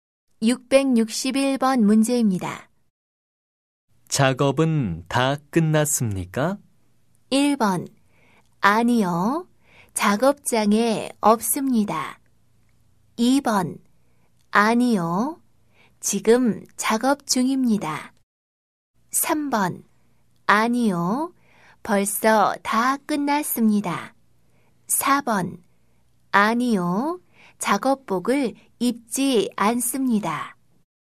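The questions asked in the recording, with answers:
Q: 작업은 다 끝났습니까?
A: 2: 아니요. 지금 작업 중입니다.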